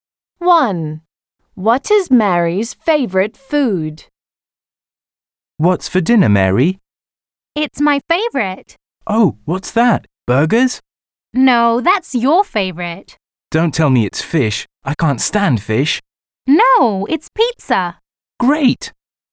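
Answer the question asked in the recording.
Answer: pizza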